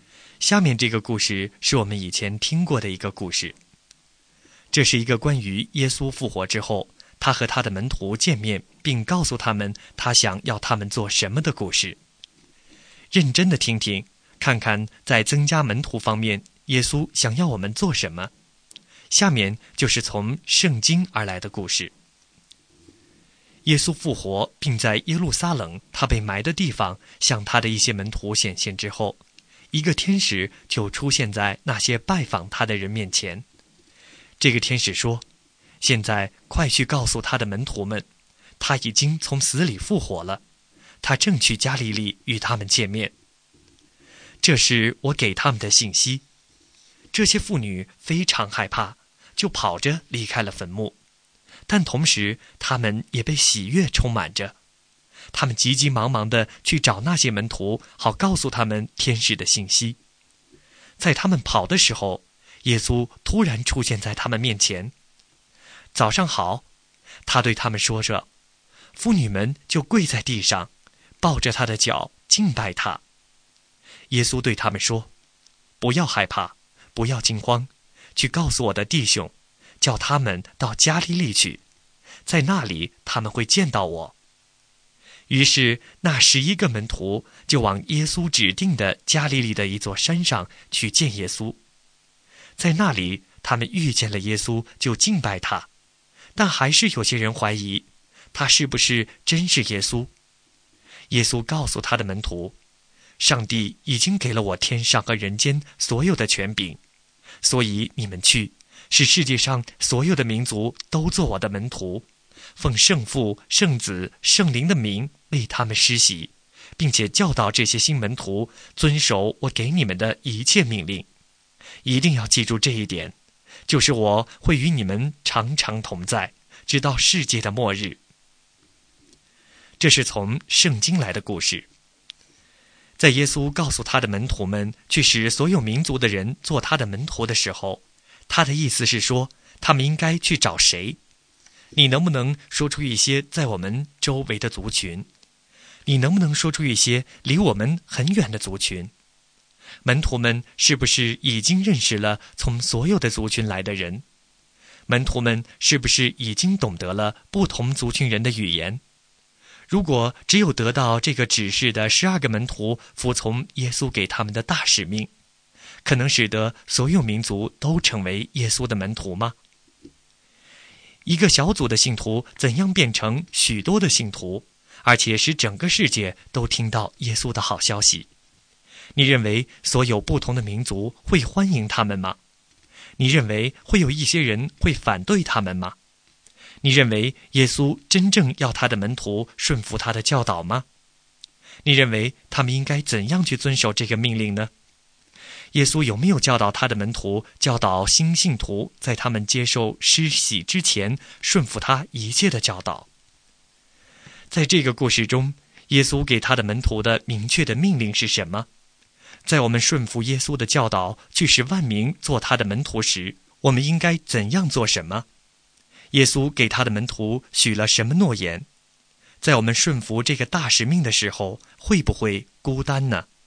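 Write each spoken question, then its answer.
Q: 在耶稣告诉他的门徒们去使所有民族的人做他的门徒的时候,他的意思是说,他们应该去找谁?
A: 世界上所有民族的人

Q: 在这个故事中,耶稣给他的门徒的明确的命令是什么?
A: 去使万民做他的门徒,奉圣父、圣子、圣灵的名为他们施洗,教导他们遵守他的一切命令

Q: 耶稣给他的门徒许了什么诺言?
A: 他会与他们常常同在,直到世界的末日

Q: 在我们顺服这个大使命的时候,会不会孤单呢?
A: 不会,耶稣常与我们同在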